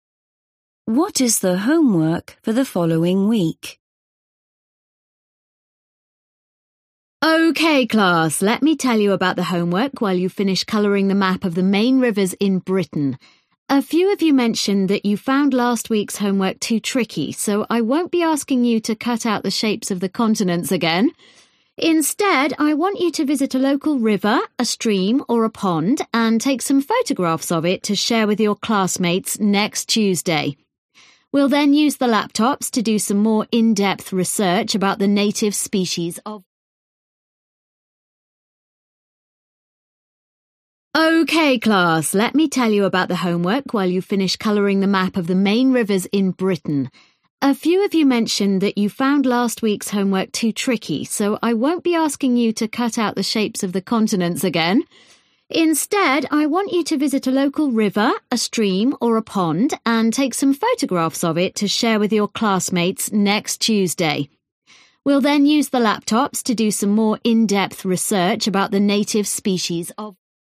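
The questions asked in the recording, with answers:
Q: What is the homework for the following week?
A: Take photographs of a local river, stream or pond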